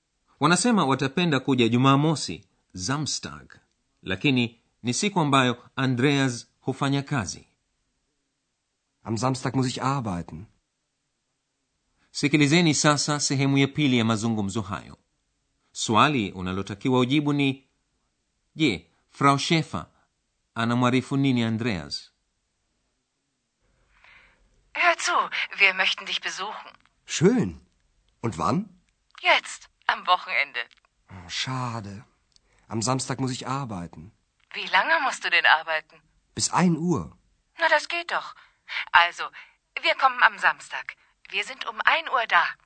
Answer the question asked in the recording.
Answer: Mamake Andreas anamwarifu mwana wao kuwa wanawasili Aachen saa saba za mchana.